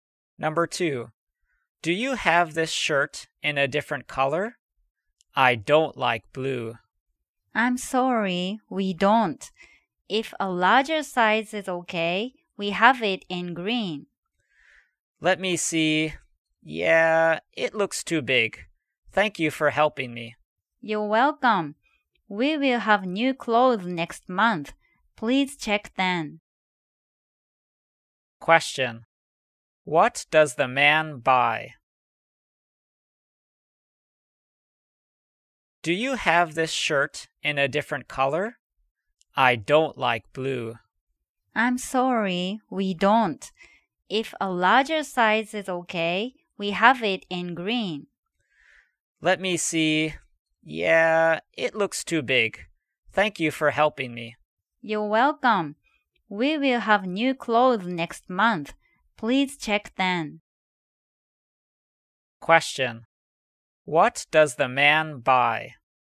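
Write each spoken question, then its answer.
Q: What does the man buy?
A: Nothing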